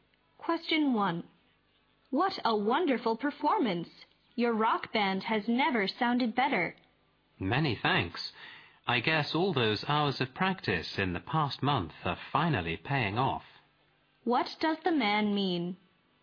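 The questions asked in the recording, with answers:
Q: What does the man mean?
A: The band's many hours of practice over the past month have finally paid off.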